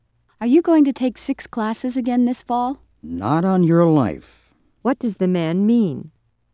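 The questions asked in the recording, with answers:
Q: What does the man mean?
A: He will definitely not take six classes again.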